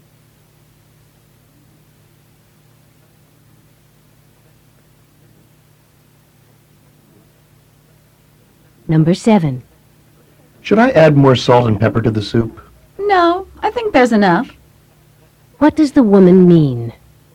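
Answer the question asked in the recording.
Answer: The soup needs no more seasoning.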